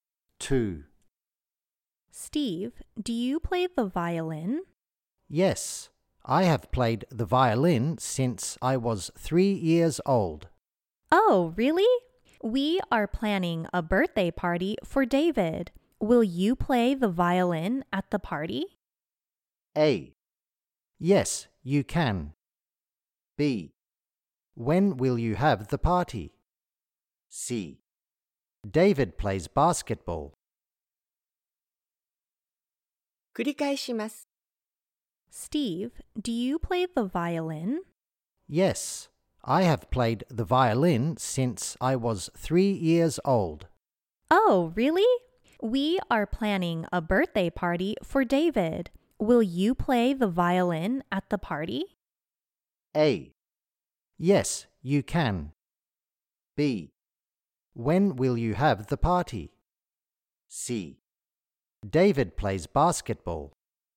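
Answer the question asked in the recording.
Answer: B: When will you have the party?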